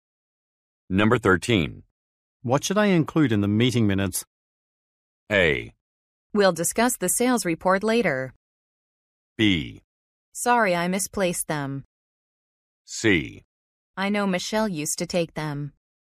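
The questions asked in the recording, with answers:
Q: What should I include in the meeting minutes?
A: C: I know Michelle used to take them.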